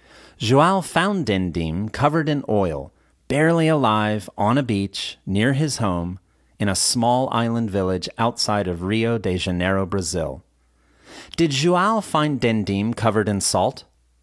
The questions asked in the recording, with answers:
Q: Did João find Dindim covered in salt?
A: No, he didn't. He found Dindim covered in oil.